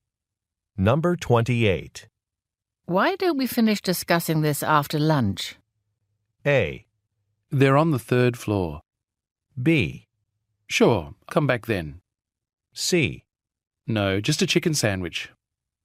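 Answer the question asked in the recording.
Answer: B: Sure, come back then.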